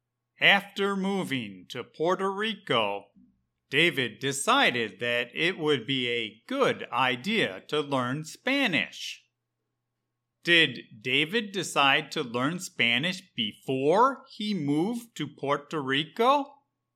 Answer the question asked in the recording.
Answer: No. David decided to learn Spanish after he moved to Puerto Rico.